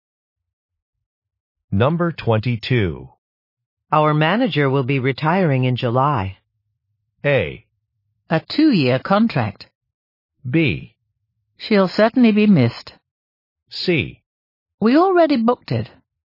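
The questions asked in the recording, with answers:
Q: Our manager will be retiring in July.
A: B: She'll certainly be missed.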